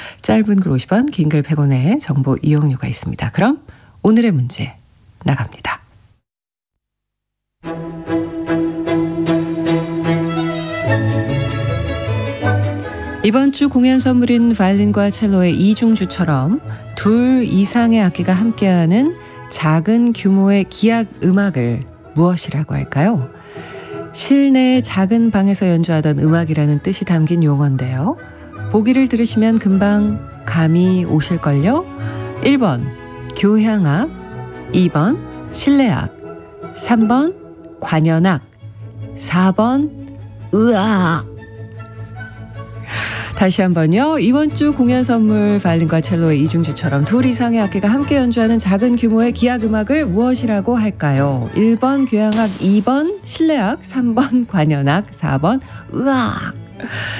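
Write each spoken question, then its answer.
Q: 이번 주 공연 선물인 바이올린과 첼로의 이중주처럼 둘 이상의 악기가 함께하는 작은 규모의 기악 음악을 무엇이라고 할까요?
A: 2번: 실내악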